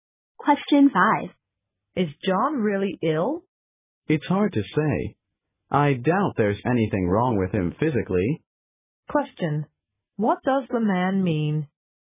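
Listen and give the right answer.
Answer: He doubts John is really ill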